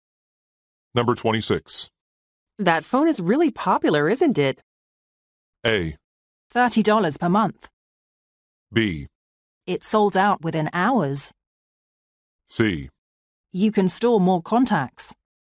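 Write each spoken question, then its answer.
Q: That phone is really popular, isn't it?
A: B: It sold out within hours.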